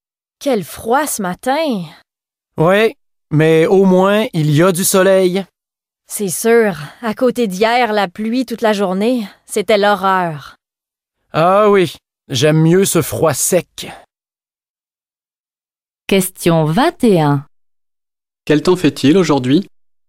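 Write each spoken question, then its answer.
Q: Quel temps fait-il aujourd'hui?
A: Il fait froid, mais il y a du soleil (froid sec).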